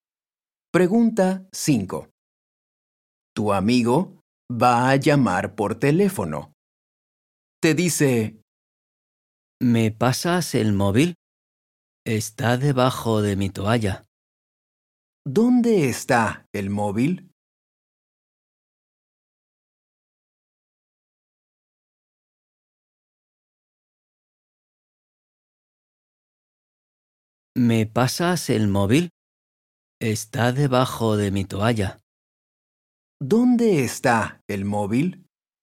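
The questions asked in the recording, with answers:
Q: ¿Dónde está el móvil?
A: Debajo de la toalla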